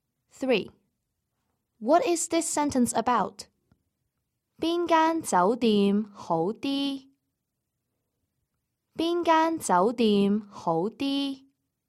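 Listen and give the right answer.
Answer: Asking which hotel is better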